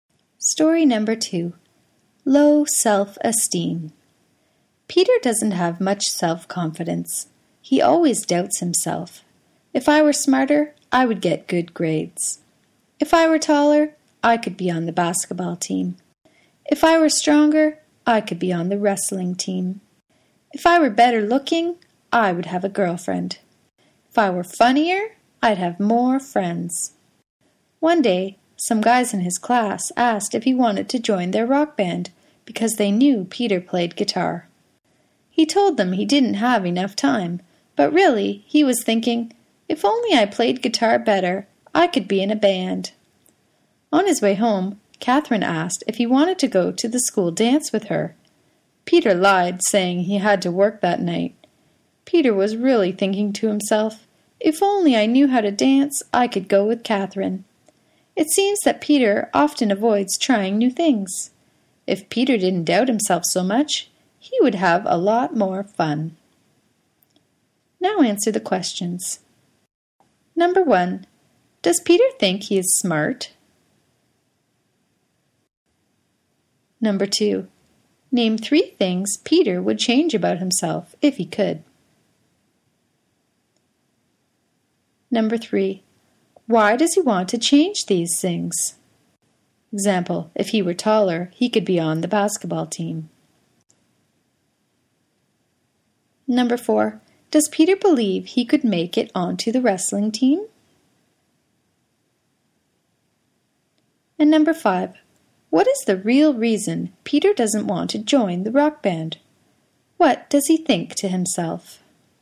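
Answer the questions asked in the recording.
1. No
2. Be smarter, taller, stronger (also better looking, funnier)
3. To get good grades, be on the basketball and wrestling teams, have a girlfriend and more friends
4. No, only if he were stronger
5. He thinks he doesn't play guitar well enough
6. If only I played guitar better, I could be in a band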